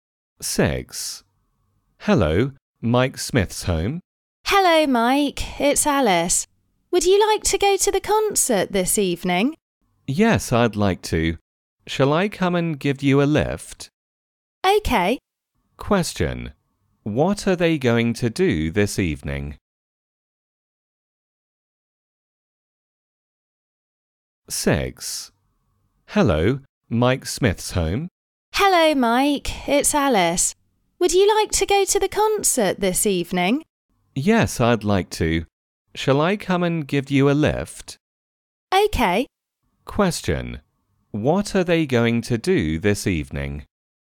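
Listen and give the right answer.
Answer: Go to a concert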